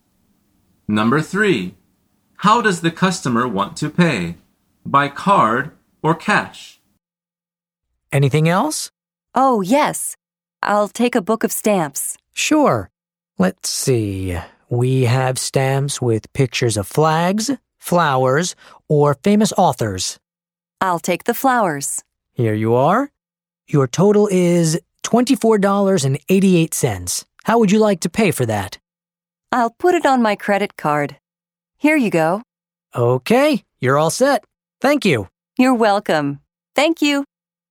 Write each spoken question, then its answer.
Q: How does the customer want to pay?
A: The answer is by card. She says, I'll put it on my credit card.